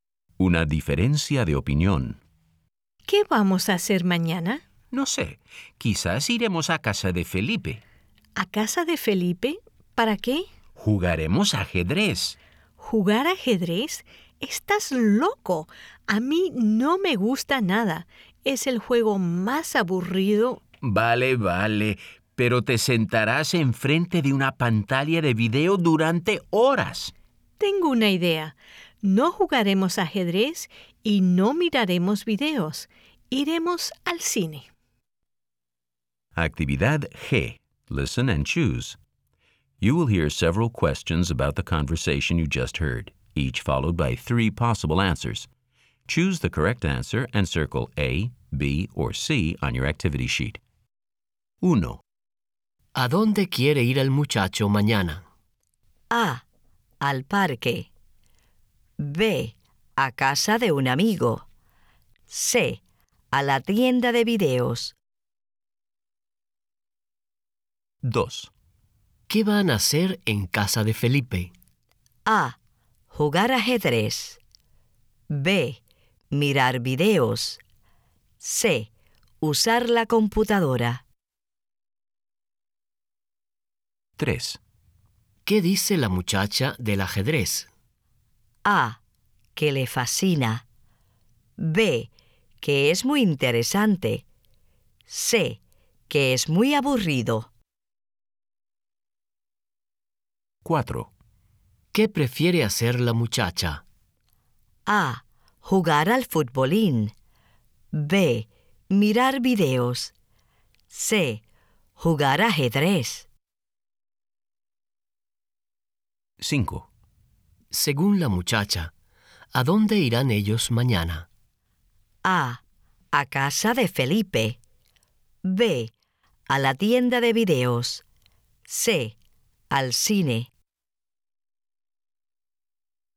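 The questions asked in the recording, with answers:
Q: ¿A dónde quiere ir el muchacho mañana?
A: B: A casa de un amigo.

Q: ¿Qué van a hacer en casa de Felipe?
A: A: Jugar ajedrez.

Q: ¿Qué dice la muchacha del ajedrez?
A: C: Que es muy aburrido.

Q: ¿Qué prefiere hacer la muchacha?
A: B: Mirar videos.

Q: Según la muchacha, ¿a dónde irán ellos mañana?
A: C: Al cine.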